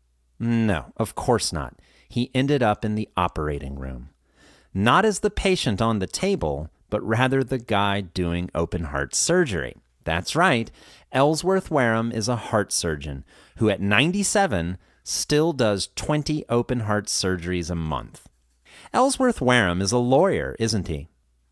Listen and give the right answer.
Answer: No, he's not. He's a doctor.